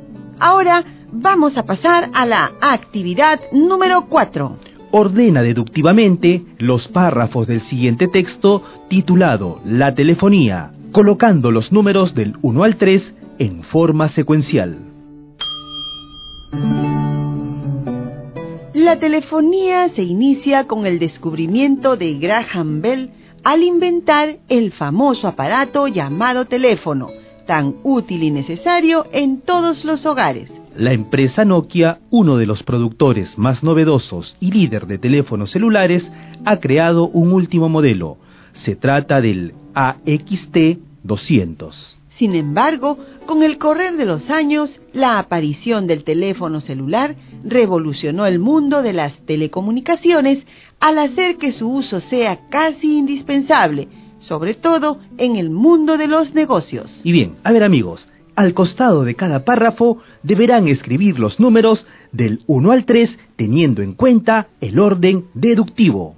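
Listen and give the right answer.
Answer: Graham Bell inventa el teléfono (1), aparición del teléfono celular (2), modelo AXT200 de Nokia (3)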